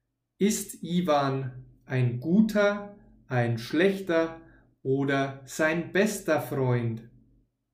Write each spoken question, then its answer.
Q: Ist Ivan ein guter, ein schlechter oder sein bester Freund?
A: Er ist sein bester Freund.